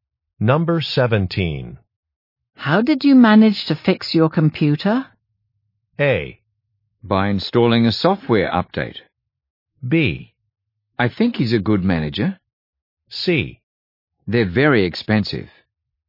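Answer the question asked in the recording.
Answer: A: By installing a software update.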